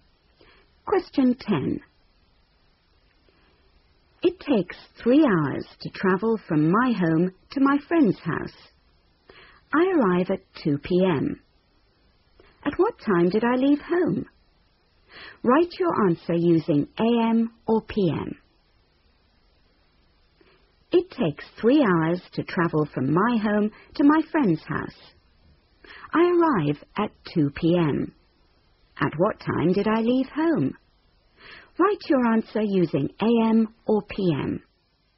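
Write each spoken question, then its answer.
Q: At what time did I leave home?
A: 11 a.m.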